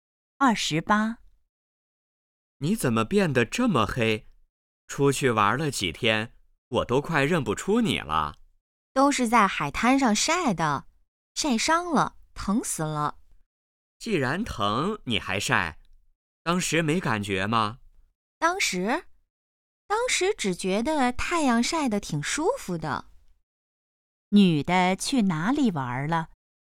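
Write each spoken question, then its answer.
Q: 女的去哪里玩了?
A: 海滩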